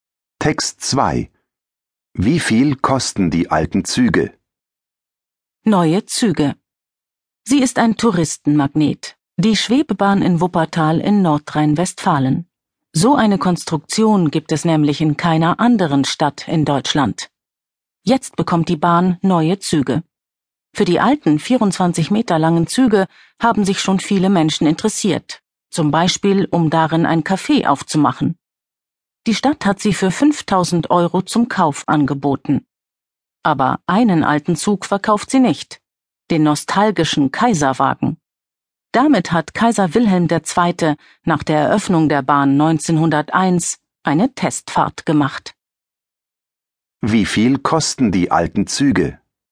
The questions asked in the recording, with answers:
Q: Wie viel kosten die alten Züge?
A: Sie kosten 5000 Euro.